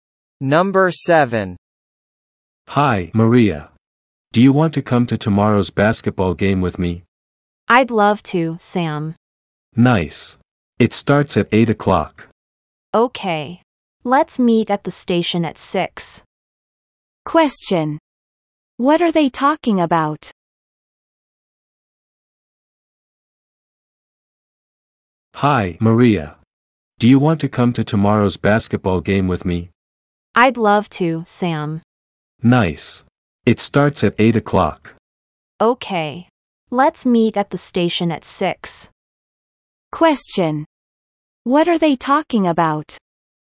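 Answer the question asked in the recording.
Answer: Going to tomorrow's basketball game together.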